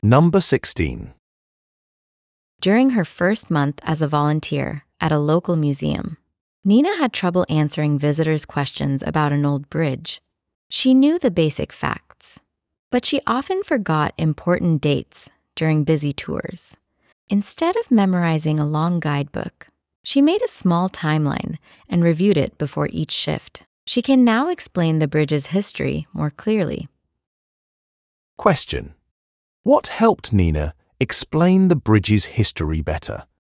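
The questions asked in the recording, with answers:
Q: What helped Nina explain the bridge's history better?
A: Reviewing a small timeline she made before each shift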